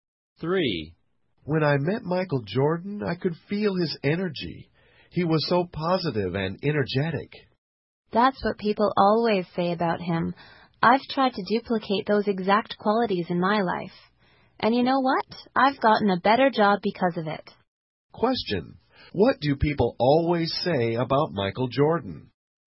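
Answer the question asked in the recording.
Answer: That he is positive and energetic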